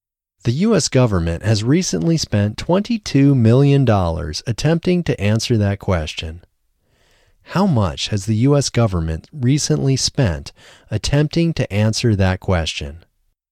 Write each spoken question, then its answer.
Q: How much has the U.S. government recently spent attempting to answer that question?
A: The U.S. government has recently spent $22 million attempting to answer that question.